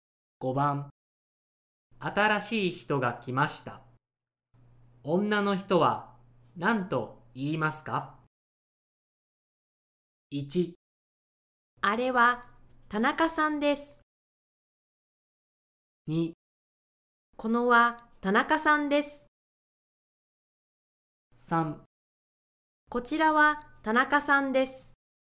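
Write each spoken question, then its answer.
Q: 新しい人が来ました。女の人は何と言いますか?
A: 3: こちらは田中さんです。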